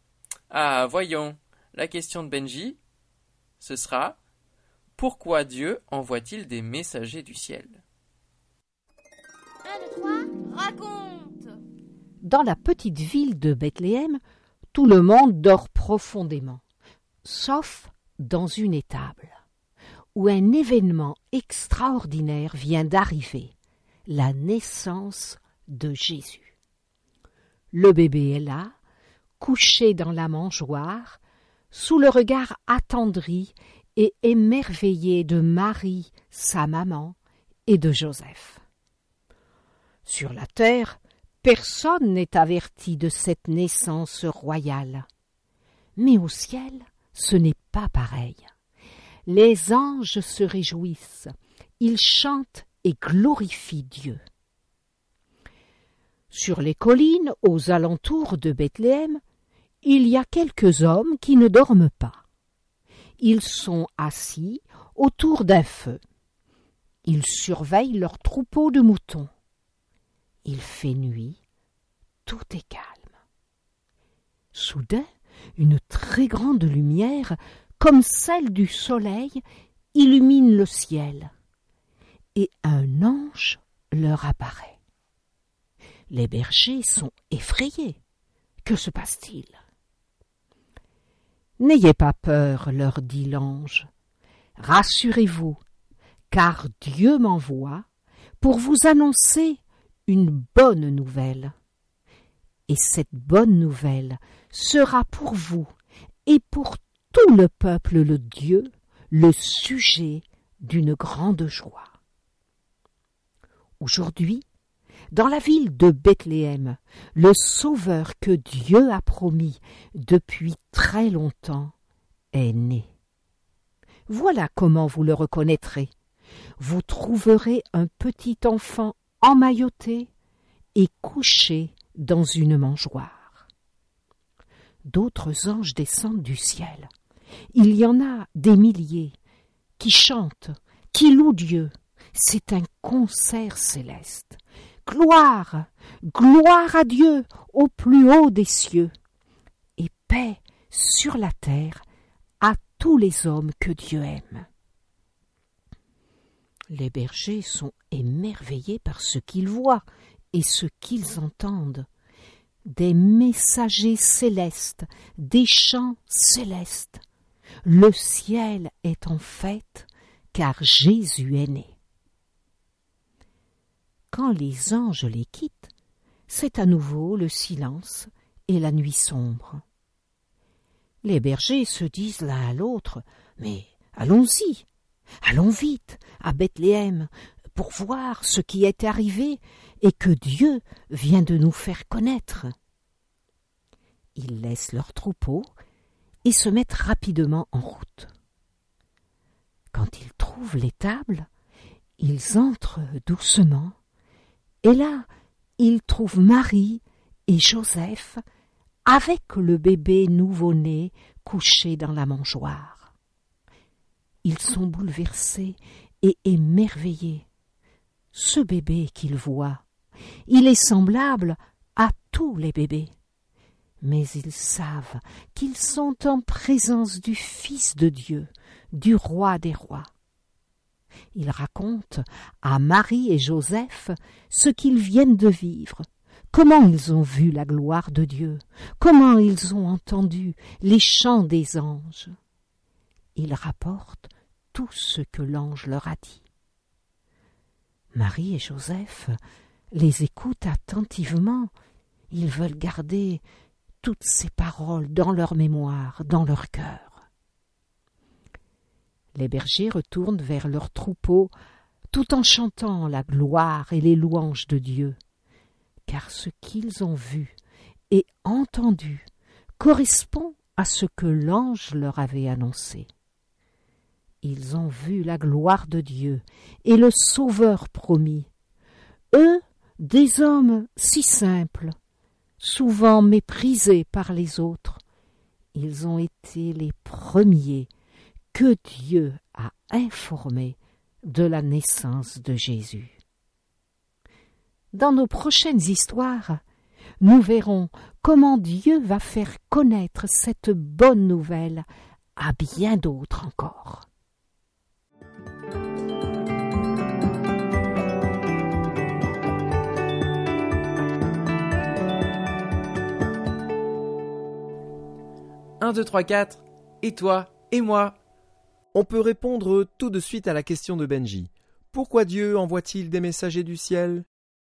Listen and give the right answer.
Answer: Eh bien, il envoie ses anges parce qu'il veut que les bergers sachent que Jésus est né.